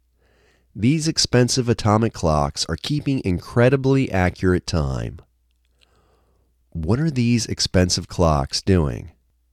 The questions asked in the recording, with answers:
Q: What are these expensive clocks doing?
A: These expensive clocks are keeping incredibly accurate time.